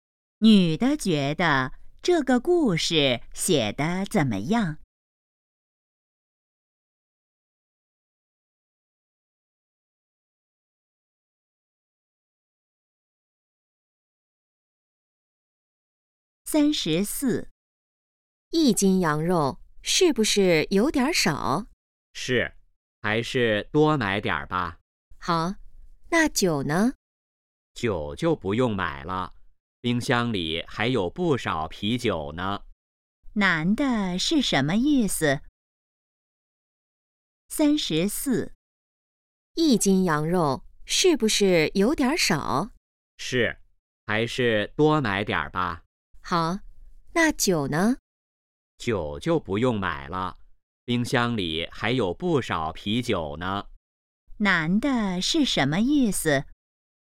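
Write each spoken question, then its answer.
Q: 男的是什么意思?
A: 不用买酒了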